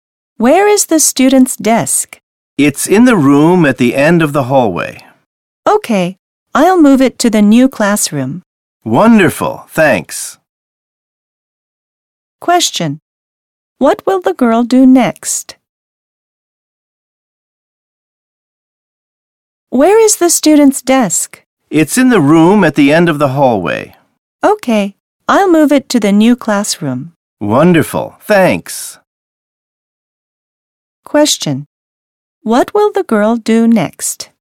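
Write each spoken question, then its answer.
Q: What will the girl do next?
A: Move the student's desk to the new classroom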